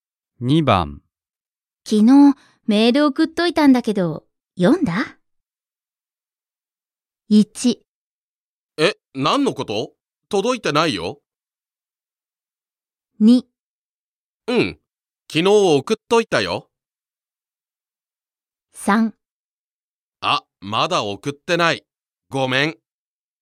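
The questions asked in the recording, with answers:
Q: 昨日メール送っといたんだけど、読んだ?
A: 1: え、何のこと?届いてないよ。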